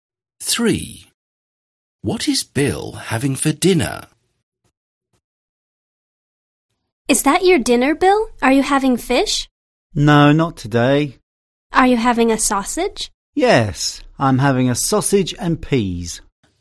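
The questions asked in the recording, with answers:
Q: What is Bill having for dinner?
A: A sausage and peas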